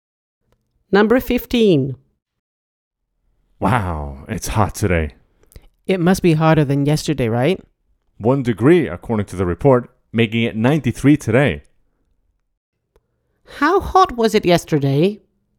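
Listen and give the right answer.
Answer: 92 degrees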